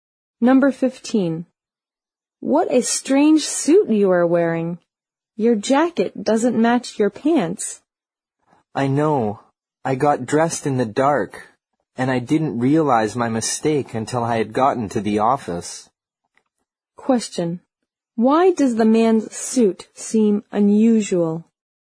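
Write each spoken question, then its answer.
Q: Why does the man's suit seem unusual?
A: His jacket doesn't match his pants.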